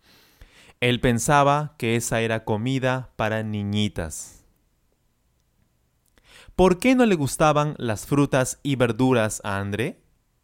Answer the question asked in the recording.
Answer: A André no le gustaban las frutas y verduras porque pensaba que eso era comida para niñitas.